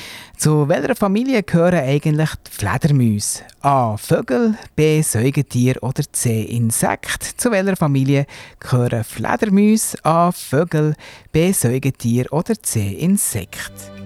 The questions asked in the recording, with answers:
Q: Zu welcher Familie gehören eigentlich die Fledermäuse?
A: Antwort B ist die Auflösung.